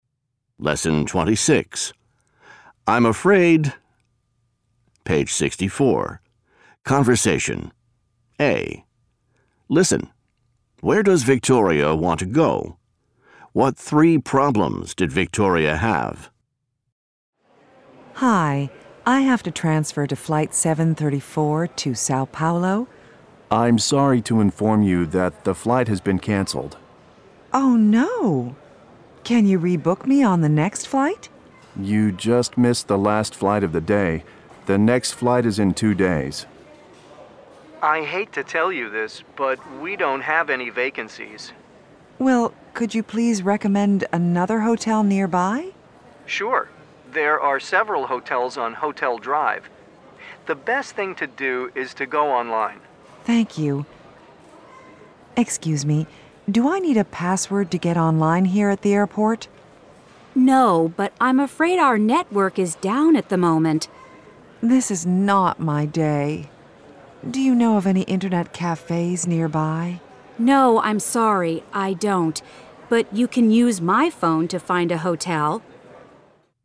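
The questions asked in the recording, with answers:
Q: Where does Victoria want to go?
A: Sao Paulo

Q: What three problems did Victoria have?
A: Her flight was canceled, the hotel had no vacancies, and the airport network was down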